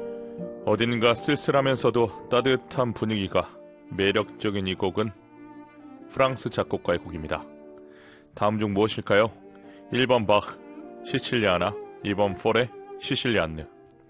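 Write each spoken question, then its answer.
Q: 다음 중 무엇일까요? 1번 바흐 시칠리아나, 2번 포레 시실리안느.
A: 2: 포레 시실리안느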